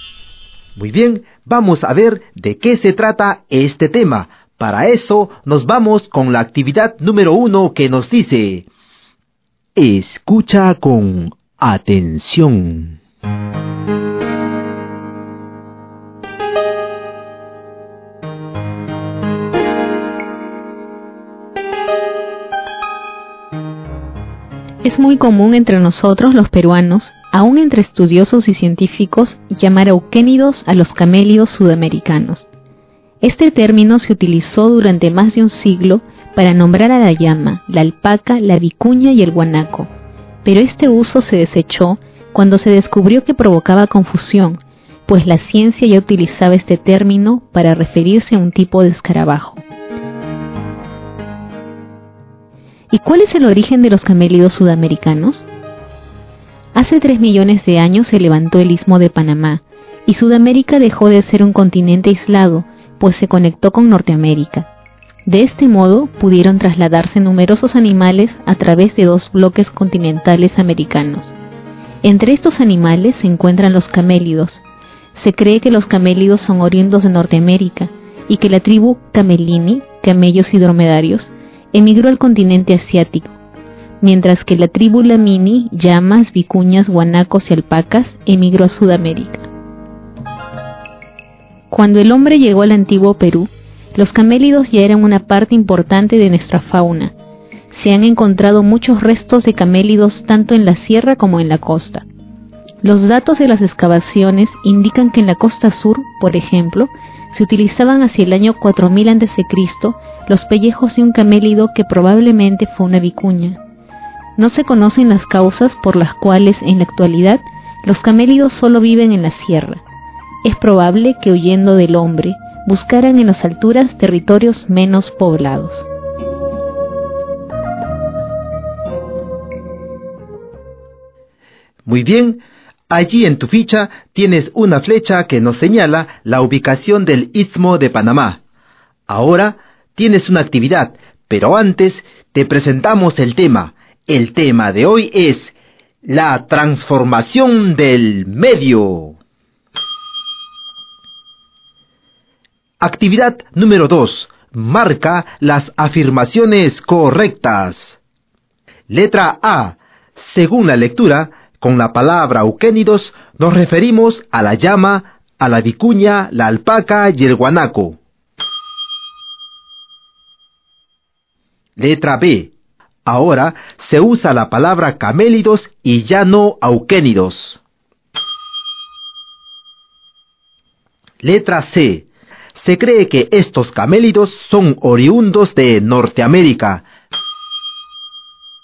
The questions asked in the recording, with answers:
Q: Letra A. Según la lectura, con la palabra euquénidos nos referimos a la llama, a la vicuña, la alpaca y el guanaco.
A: Pues sí, porque según la lectura que acabamos de escuchar, hasta algunos estudiosos y científicos usan este término.